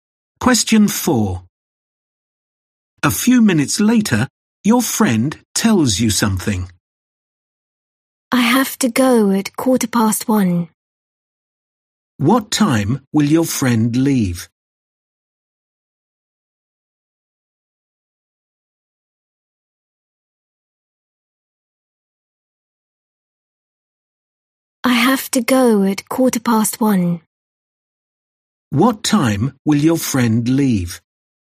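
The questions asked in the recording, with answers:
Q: What time will your friend leave?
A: 1:15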